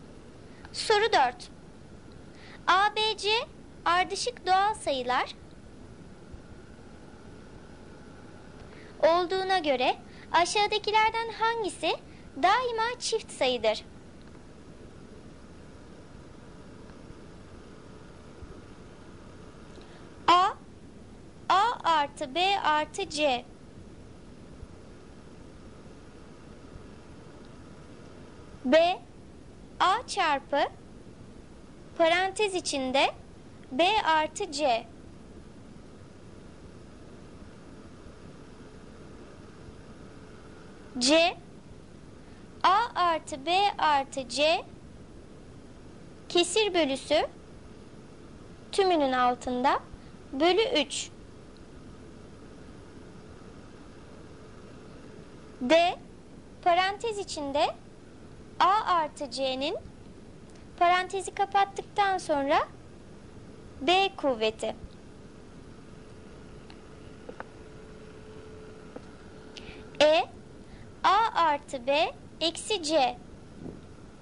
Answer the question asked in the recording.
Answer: Doğru cevap D seçeneği. A artı C'nin B kuvveti.